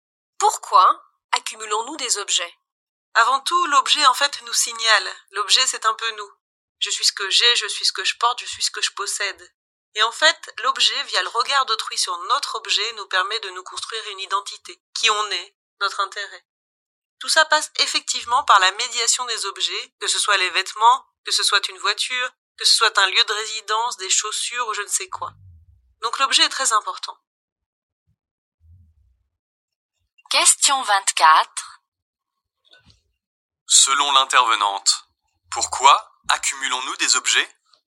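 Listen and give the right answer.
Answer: Pour nous construire une identité à travers le regard des autres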